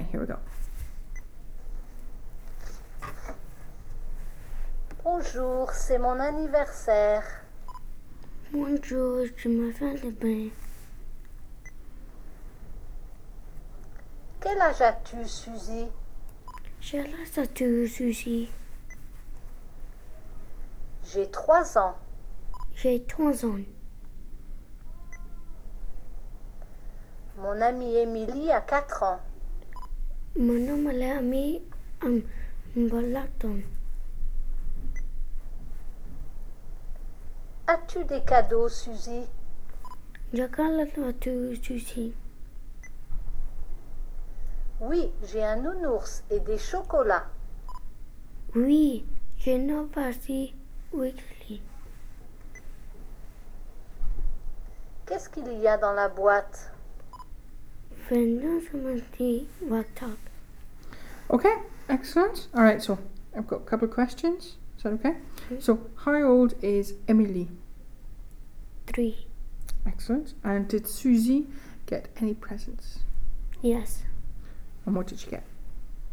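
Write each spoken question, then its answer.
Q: And did Suzy get any presents?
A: Yes.

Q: And what did she get?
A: A teddy bear and chocolates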